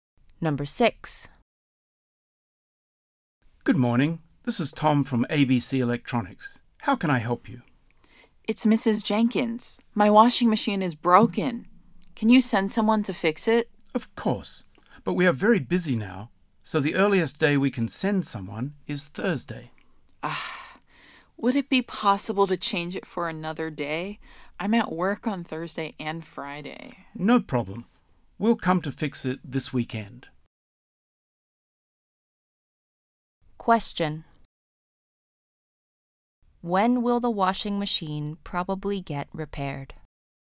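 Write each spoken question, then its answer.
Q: When will the washing machine probably get repaired?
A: This weekend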